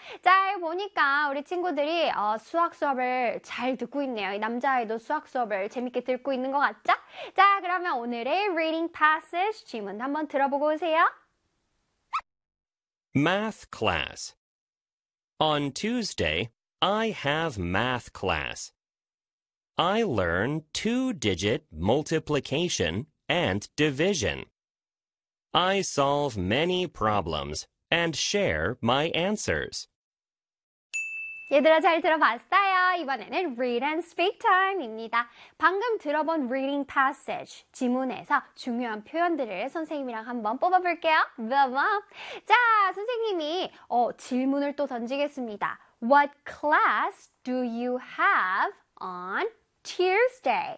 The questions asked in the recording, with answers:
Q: What class do you have on Tuesday?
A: On Tuesday, I have math class.